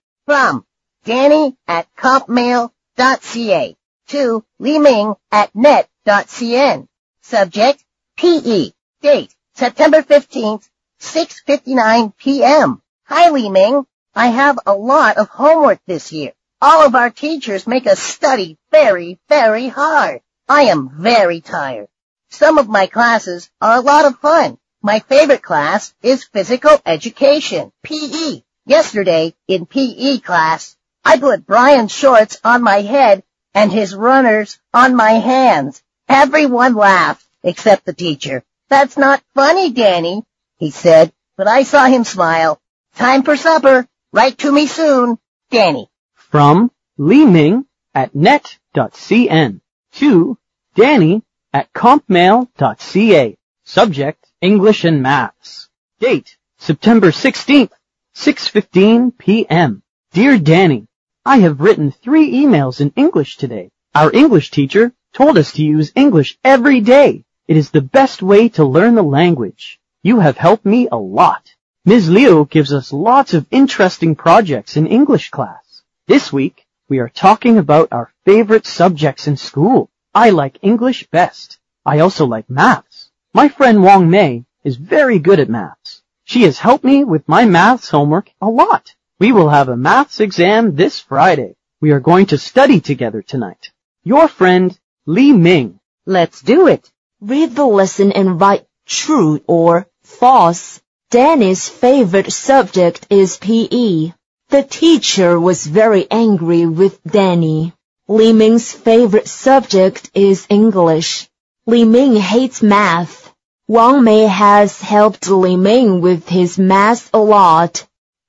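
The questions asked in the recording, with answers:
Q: Danny's favorite subject is PE.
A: True

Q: The teacher was very angry with Danny.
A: False

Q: Li Ming's favorite subject is English.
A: True

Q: Li Ming hates math.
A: False

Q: Wang Mei has helped Li Ming with his math a lot.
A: True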